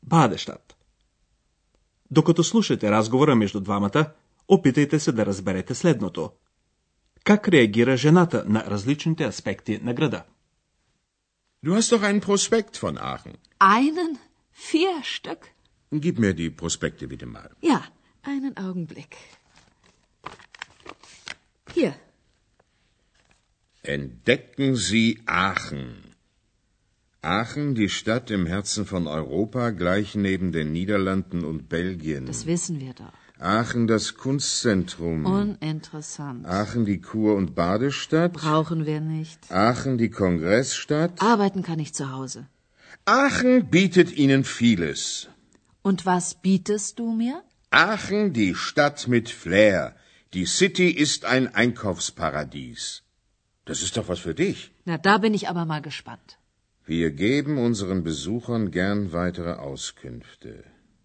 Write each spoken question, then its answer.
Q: Как реагира жената на различните аспекти на града?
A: Жената реагира с доста голямо безразличие.